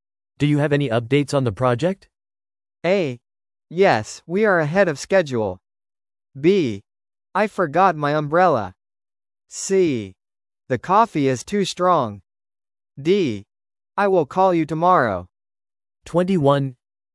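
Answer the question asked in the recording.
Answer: A: Yes, we are ahead of schedule.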